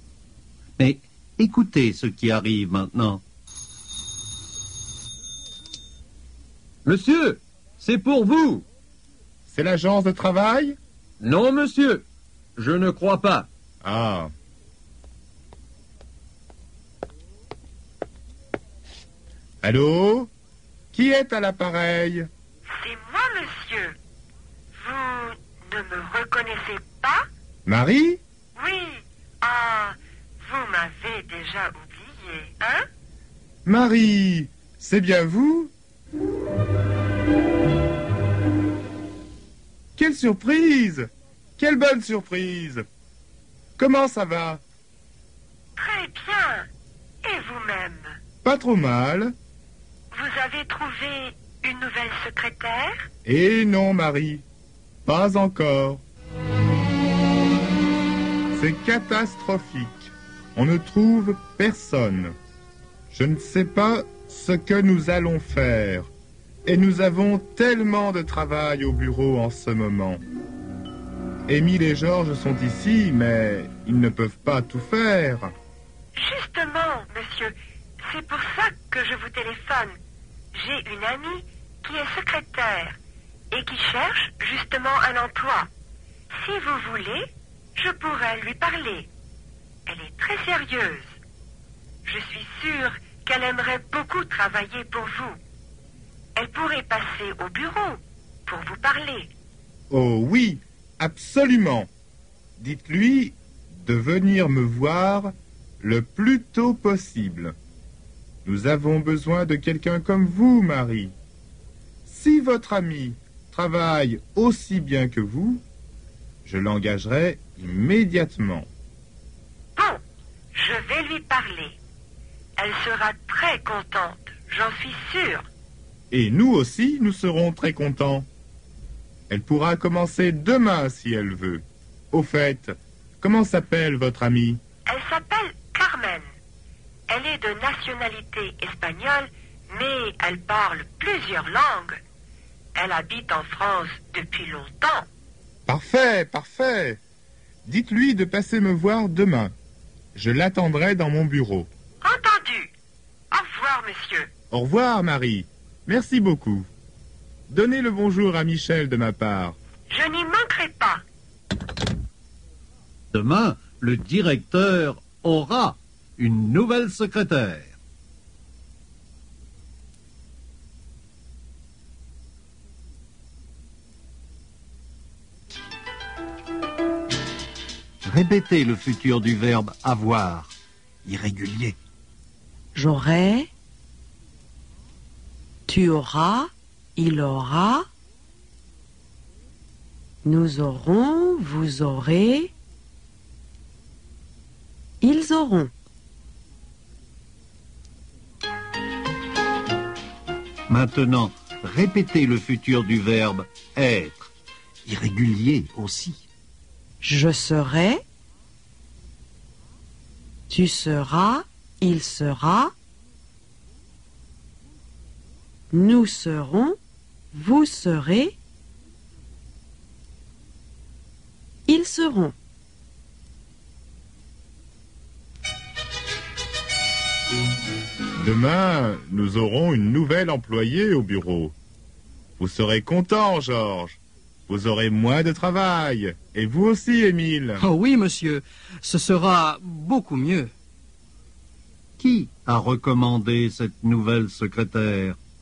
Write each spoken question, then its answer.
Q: Qui a recommandé cette nouvelle secrétaire?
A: C'est Marie qui a recommandé.